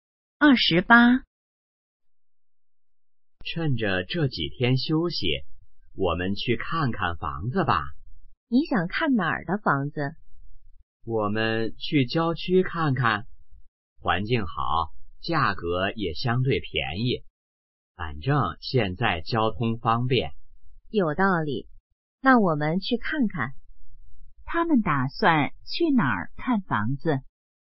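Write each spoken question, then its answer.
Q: 他们打算去哪儿看房子?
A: 郊区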